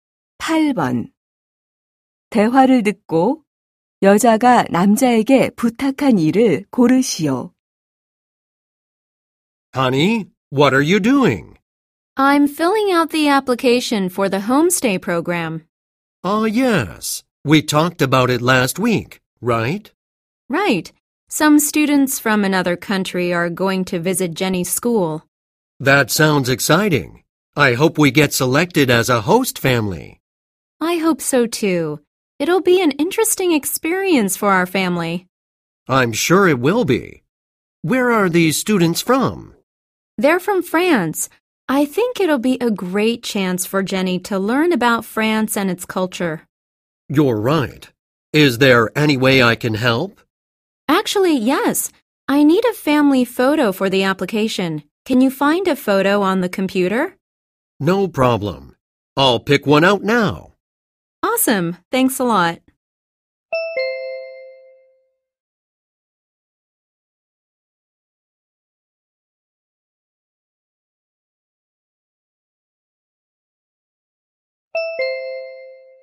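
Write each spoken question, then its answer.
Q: 대화를 듣고 여자가 남자에게 부탁한 일을 고르시오.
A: 컴퓨터에서 가족사진 찾기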